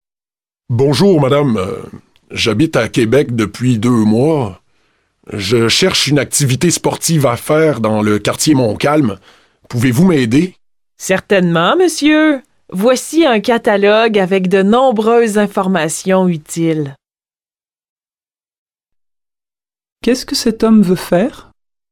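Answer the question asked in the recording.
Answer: Une activité sportive dans le quartier Montcalm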